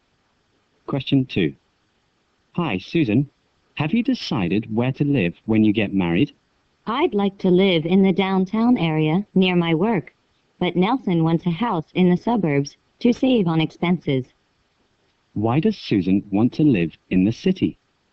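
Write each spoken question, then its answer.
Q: Why does Susan want to live in the city?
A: To be near her work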